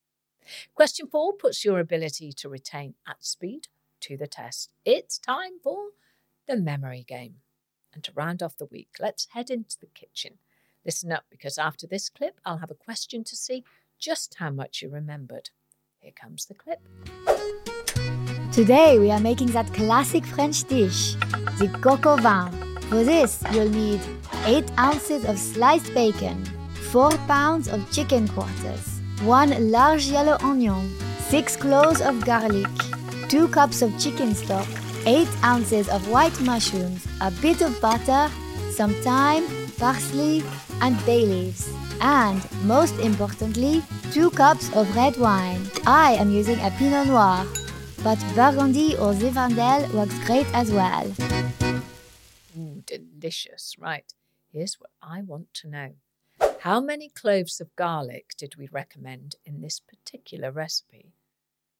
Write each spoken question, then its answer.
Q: How many cloves of garlic did we recommend in this particular recipe?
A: And the answer was 6 cloves of garlic.